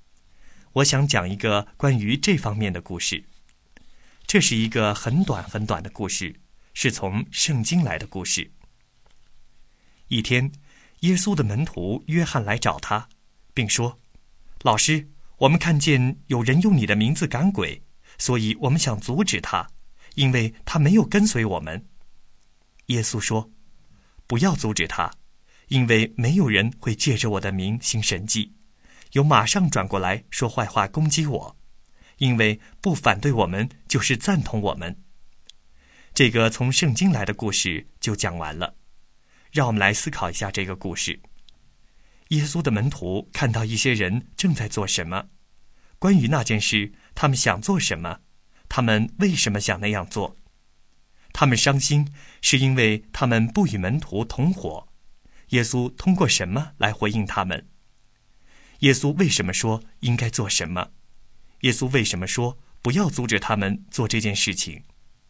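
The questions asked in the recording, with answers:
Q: 耶稣的门徒看到一些人正在做什么,关于那件事他们想做什么,他们为什么想那样做。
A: 看见有人用耶稣的名赶鬼,想阻止他,因为他没有跟随他们

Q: 他们伤心是因为他们不与门徒同伙,耶稣通过什么来回应他们?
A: 耶稣说不要阻止他

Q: 耶稣为什么说不要阻止他们做这件事情?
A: 因为奉他的名行神迹的人不会马上说他坏话;不反对我们就是赞同我们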